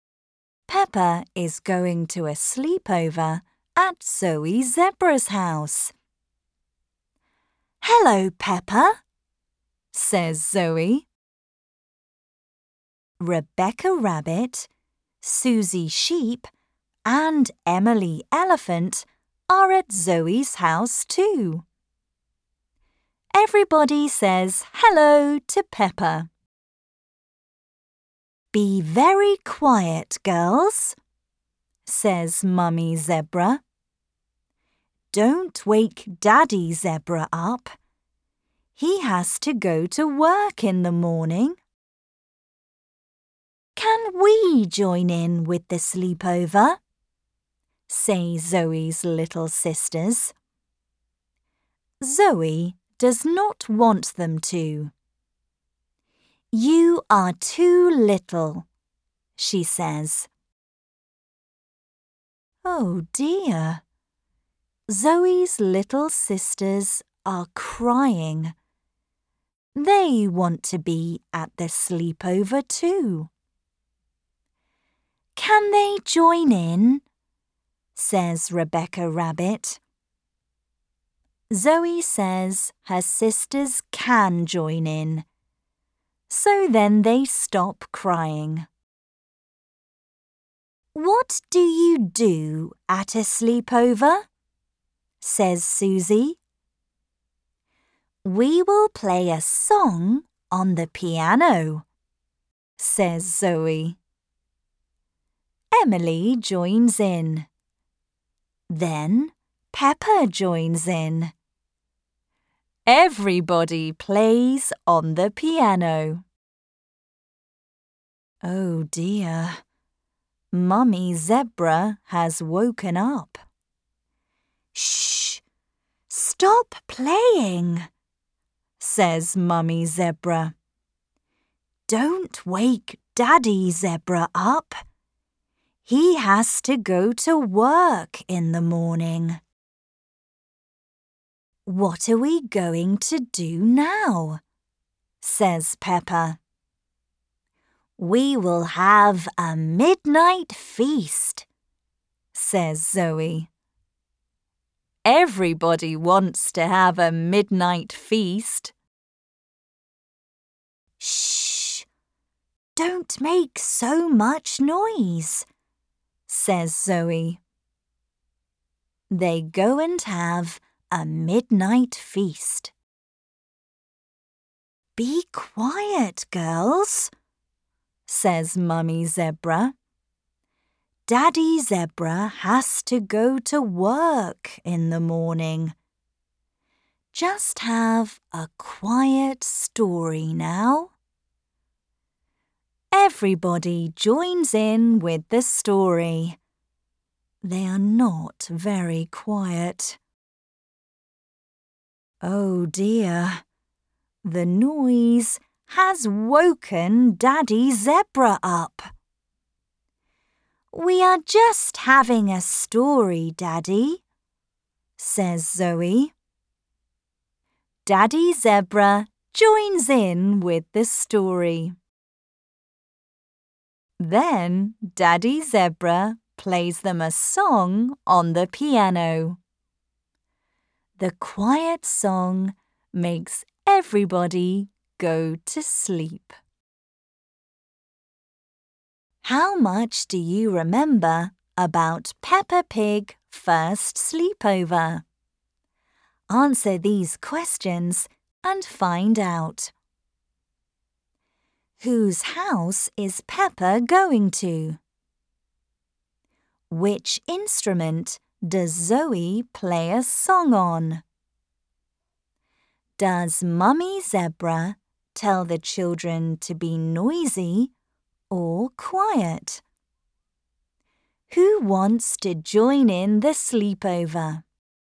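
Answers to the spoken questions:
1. Zoe Zebra's house
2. The piano
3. Quiet
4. Zoe's little sisters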